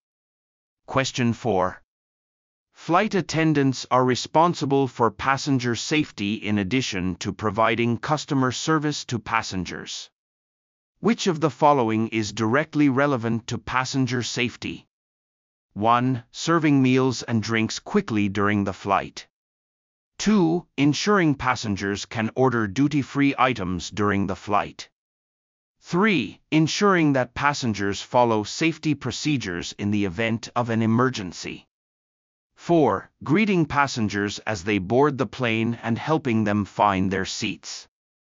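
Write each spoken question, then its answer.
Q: Which of the following is directly relevant to passenger safety?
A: 3: Ensuring that passengers follow safety procedures in the event of an emergency.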